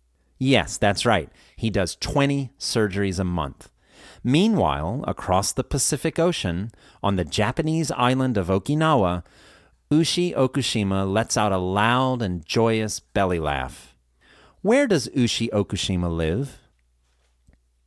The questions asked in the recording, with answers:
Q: Where does Ushi Okushima live?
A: She lives across the Pacific Ocean, on the Japanese island of Okinawa.